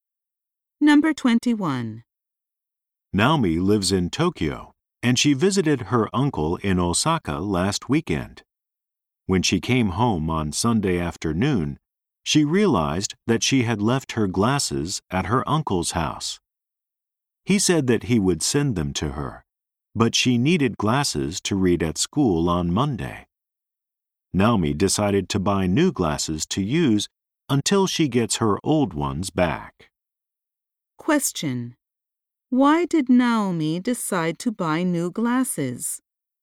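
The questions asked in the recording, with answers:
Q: Why did Naomi decide to buy new glasses?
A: She left her glasses at her uncle's house and needed glasses to read at school on Monday.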